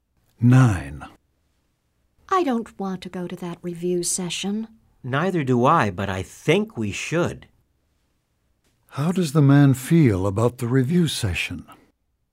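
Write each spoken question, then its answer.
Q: How does the man feel about the review session?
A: He doesn't want to go but thinks they should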